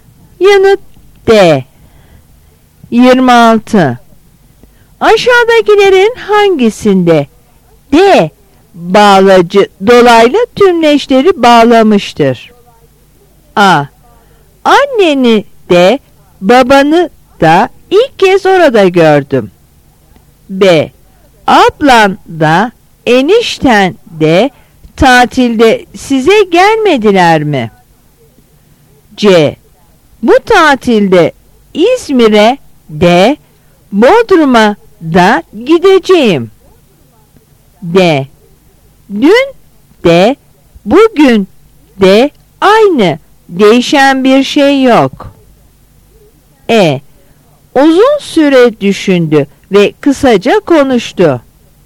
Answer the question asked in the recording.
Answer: Yanıt C.